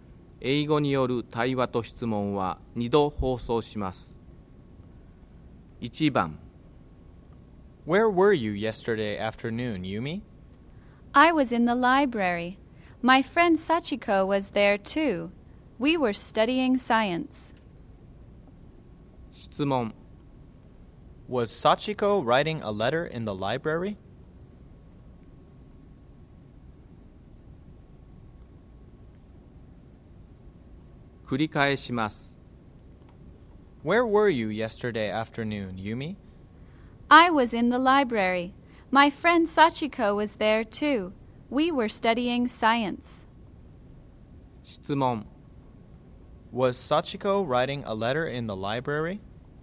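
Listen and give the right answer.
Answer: No, she wasn't. She was studying science.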